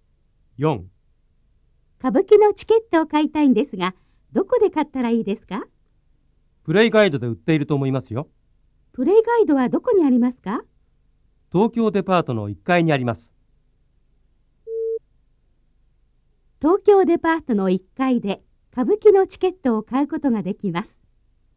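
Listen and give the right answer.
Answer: 正しい(○)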